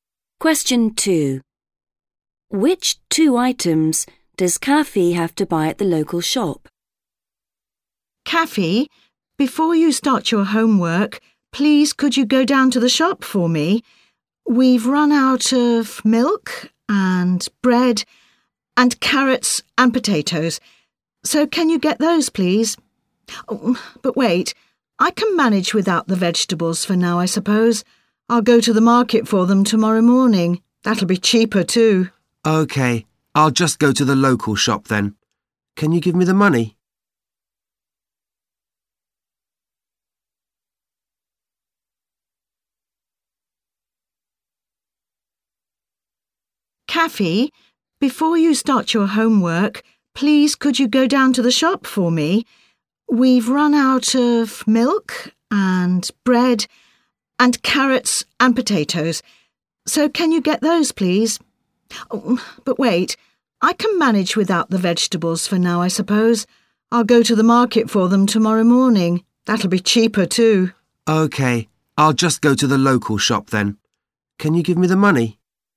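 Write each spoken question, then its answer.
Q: Which two items does Kaffee have to buy at the local shop?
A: Milk and bread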